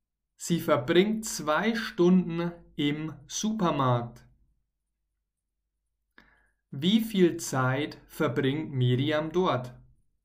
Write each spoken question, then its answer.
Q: Wie viel Zeit verbringt Miriam dort?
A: 2 Stunden. Sie verbringt dort 2 Stunden.